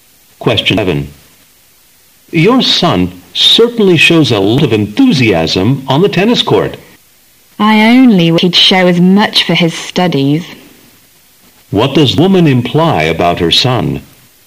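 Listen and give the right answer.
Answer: He isn't enthusiastic about his studies.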